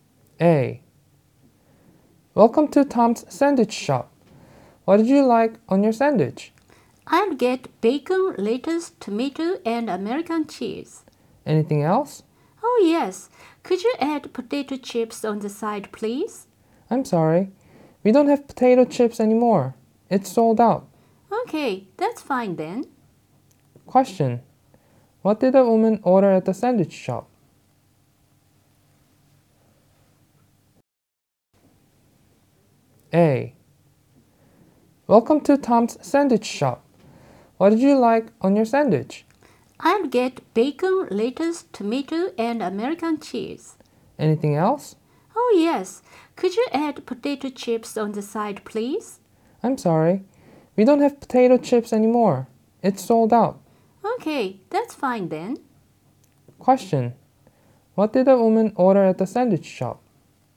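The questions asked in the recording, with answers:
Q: What did the woman order at the sandwich shop?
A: A sandwich with bacon, lettuce, tomato and American cheese (no potato chips)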